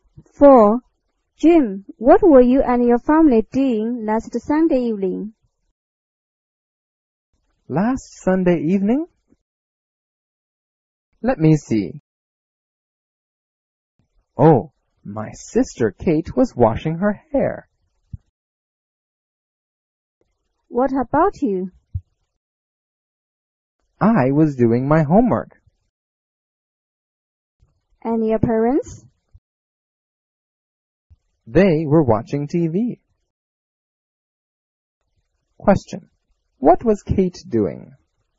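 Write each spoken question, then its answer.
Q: What was Kate doing?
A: Washing her hair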